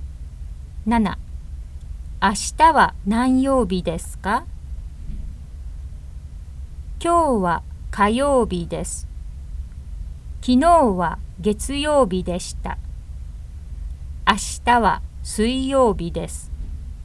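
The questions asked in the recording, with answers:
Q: 明日は何曜日ですか?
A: 水曜日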